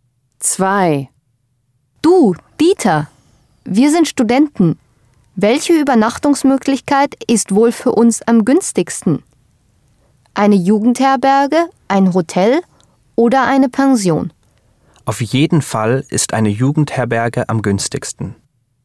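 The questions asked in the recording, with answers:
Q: Welche Übernachtungsmöglichkeit ist wohl für uns am günstigsten?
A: Eine Jugendherberge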